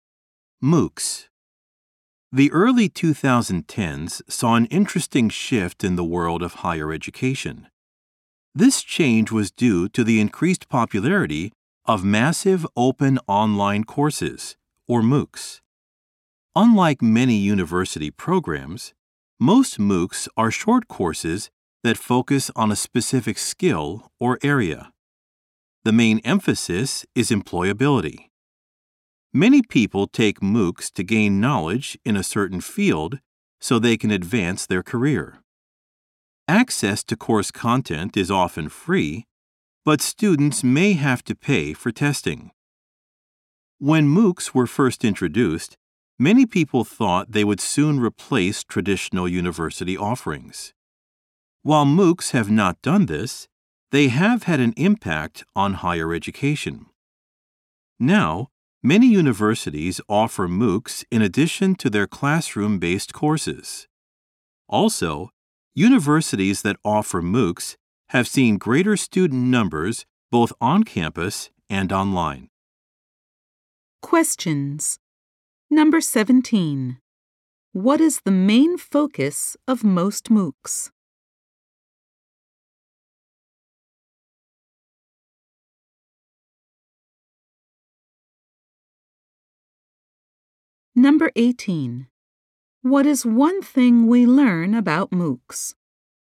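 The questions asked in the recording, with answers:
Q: What is the main focus of most MOOCs?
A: Helping people gain employment skills / advance their careers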